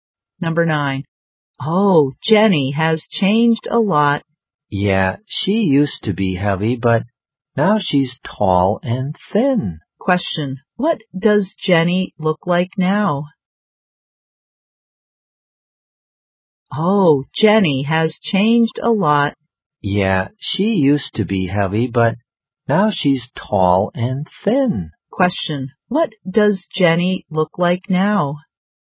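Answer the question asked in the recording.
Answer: Tall and thin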